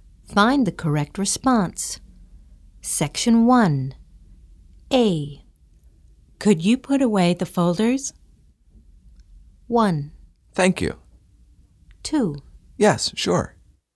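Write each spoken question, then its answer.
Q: Could you put away the folders?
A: 2: Yes, sure.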